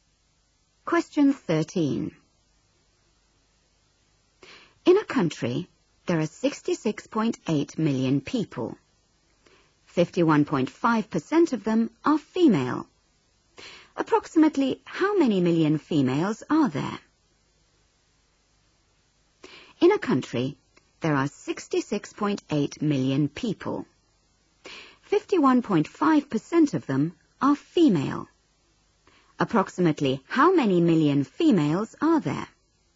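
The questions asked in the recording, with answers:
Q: Approximately how many million females are there?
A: about 34 million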